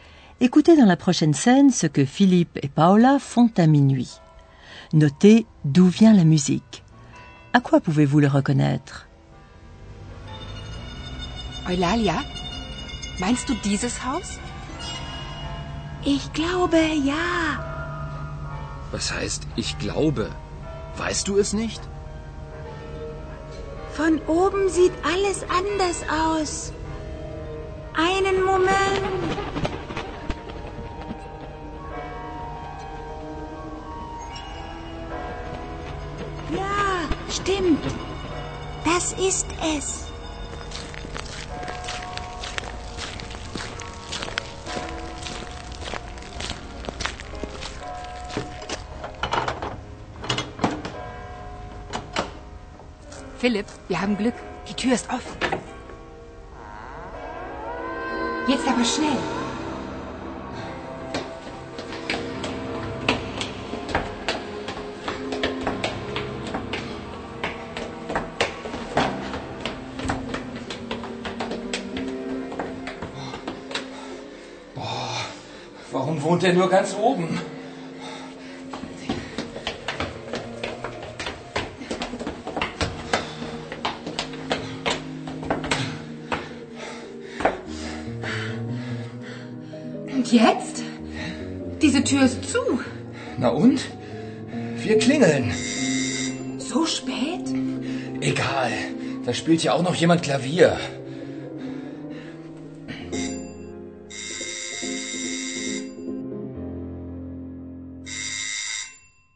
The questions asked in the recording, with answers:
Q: Notez d'où vient la musique.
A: que la musique venait de tout en haut de la maison